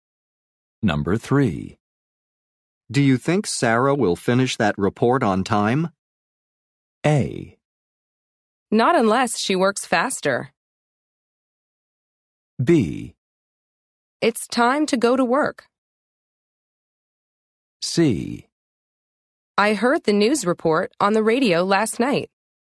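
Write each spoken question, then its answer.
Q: Do you think Sarah will finish that report on time?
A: A: Not unless she works faster.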